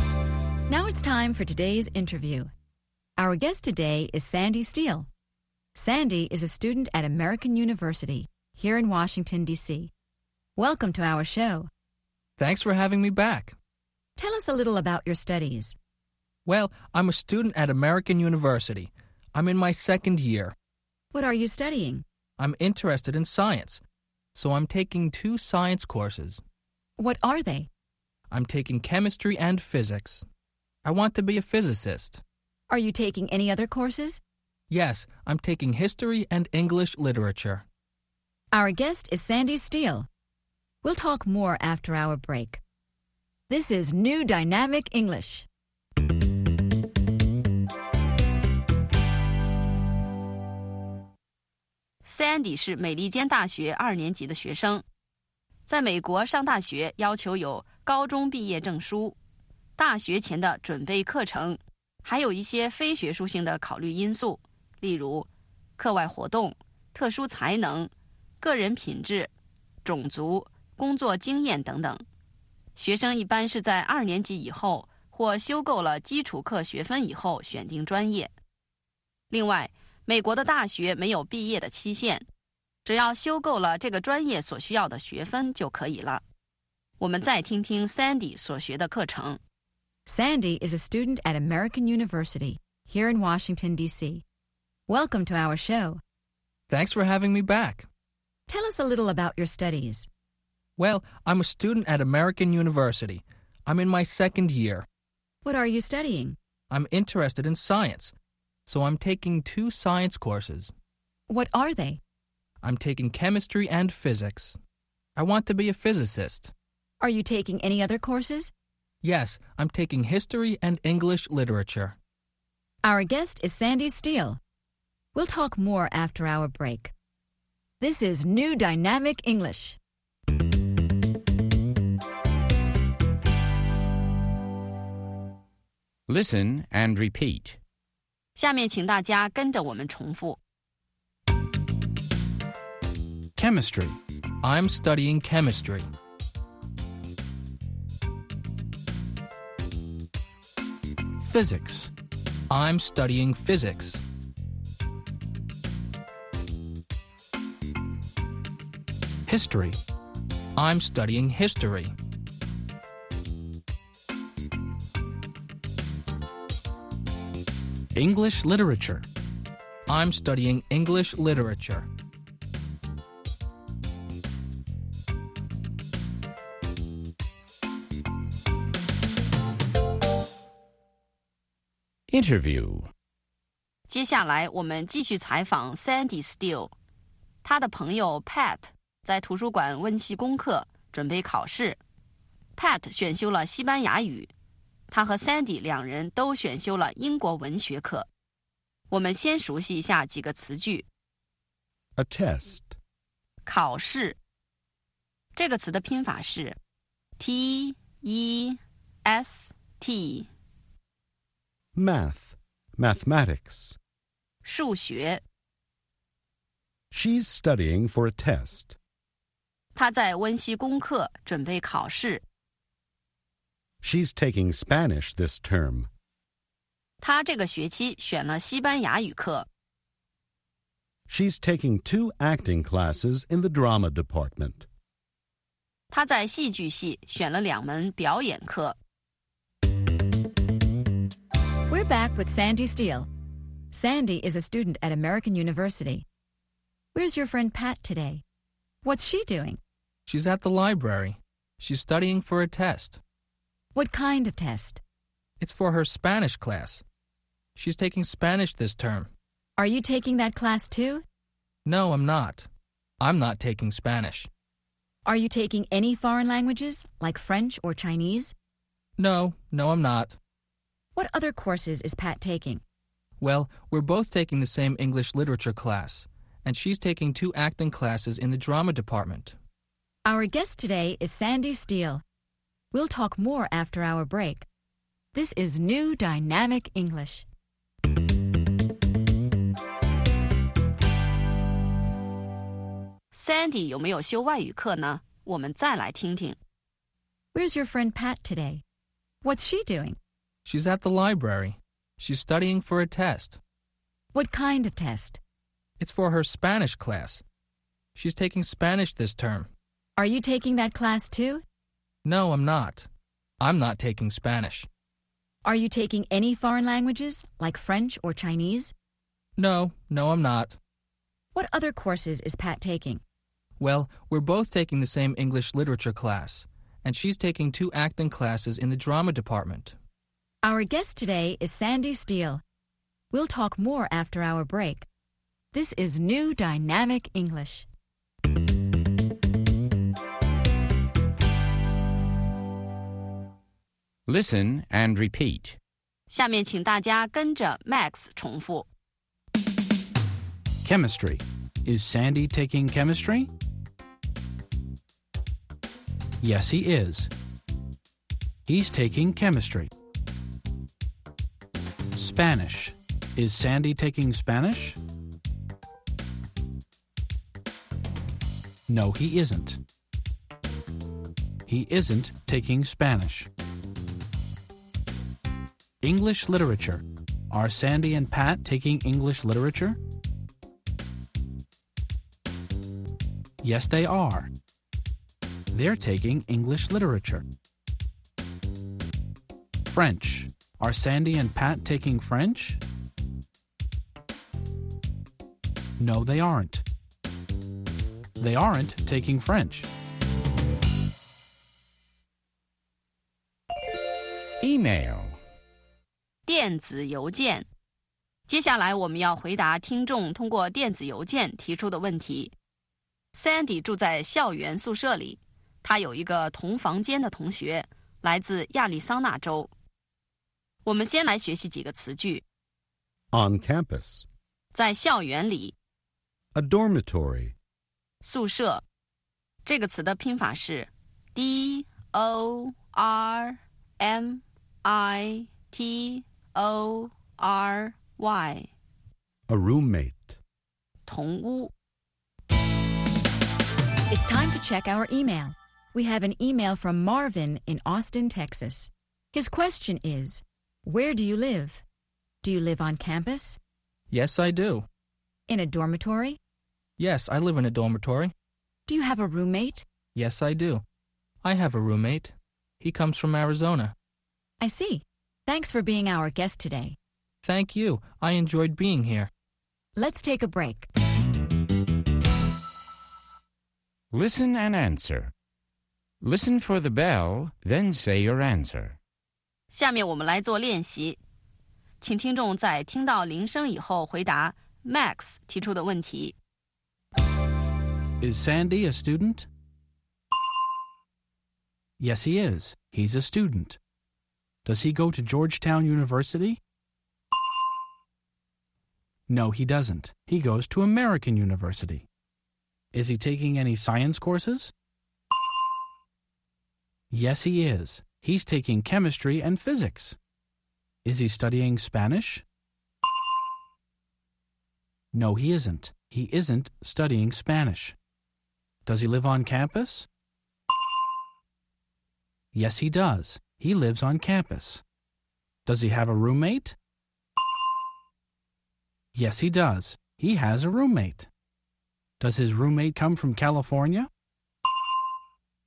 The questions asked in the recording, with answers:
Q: Is Sandy a student?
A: Yes, he is. He's a student.

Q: Does he go to Georgetown University?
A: No, he doesn't. He goes to American University.

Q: Is he taking any science courses?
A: Yes, he is. He's taking chemistry and physics.

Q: Is he studying Spanish?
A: No, he isn't. He isn't studying Spanish.

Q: Does he have a roommate?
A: Yes, he does.

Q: Does his roommate come from California?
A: No, he doesn't. Sandy's roommate comes from Arizona.